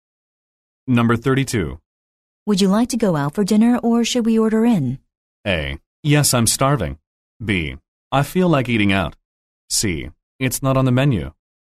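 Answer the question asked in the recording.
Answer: B: I feel like eating out.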